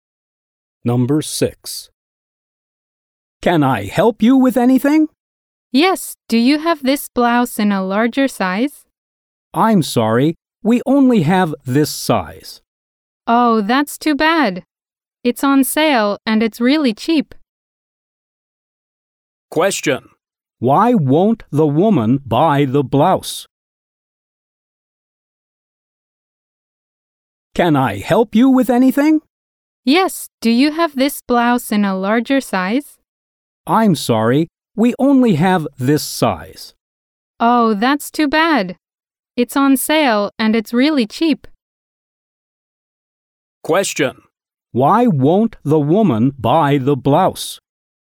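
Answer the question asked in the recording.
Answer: The store doesn't have it in a larger size.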